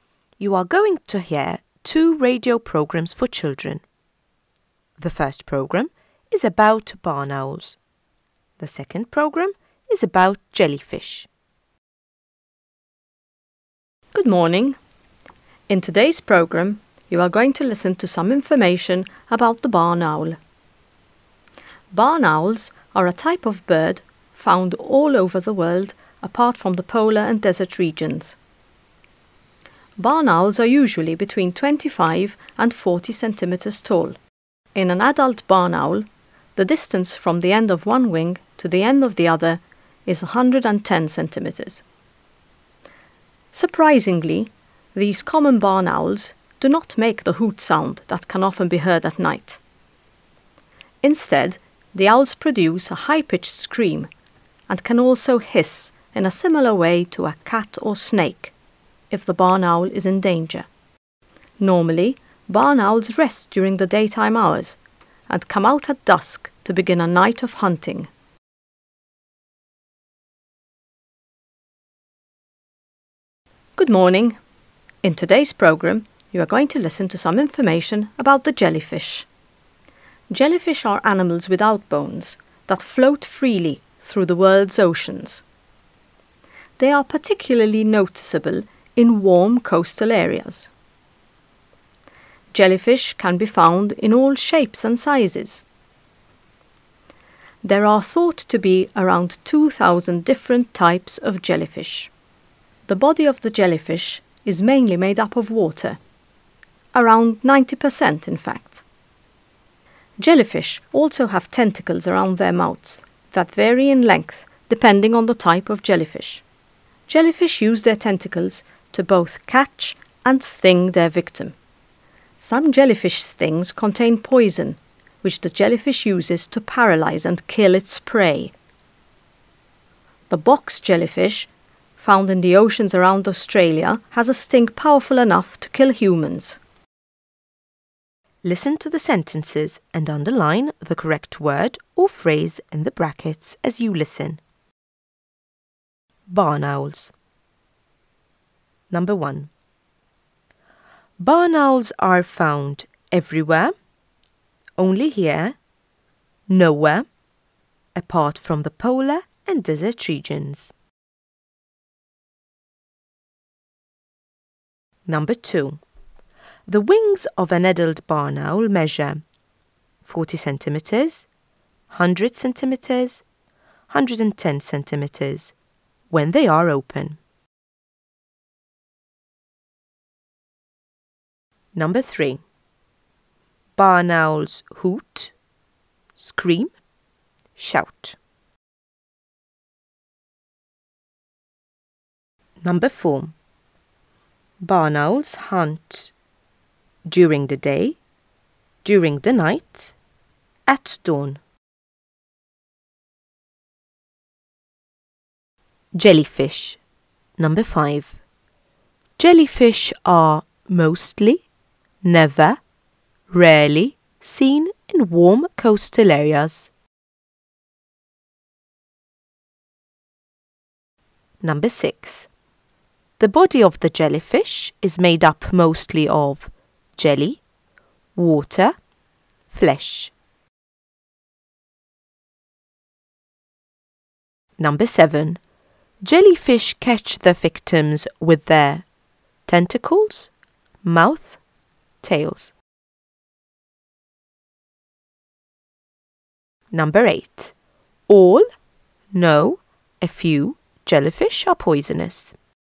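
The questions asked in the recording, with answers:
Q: Barn owls are found everywhere, only here, nowhere, apart from the polar and desert regions.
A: everywhere

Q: The wings of an adult barn owl measure 40 centimetres, 100 centimetres, 110 centimetres when they are open.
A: 110 centimetres

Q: Barn owls hoot, scream, shout.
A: scream

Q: Barn owls hunt during the day, during the night, at dawn.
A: during the night

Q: Jellyfish are mostly, never, rarely seen in warm coastal areas.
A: mostly

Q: The body of the jellyfish is made up mostly of jelly, water, flesh.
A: water

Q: Jellyfish catch their victims with their tentacles, mouth, tails.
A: tentacles

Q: All, no, a few jellyfish are poisonous.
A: a few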